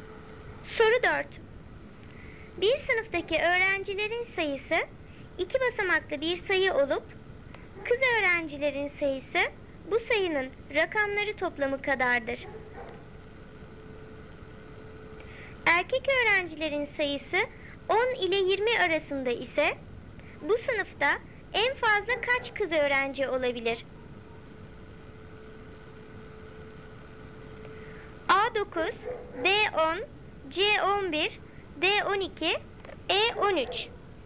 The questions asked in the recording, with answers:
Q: Erkek öğrencilerin sayısı 10 ile 20 arasında ise bu sınıfta en fazla kaç kız öğrenci olabilir?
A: Doğru cevap C 11.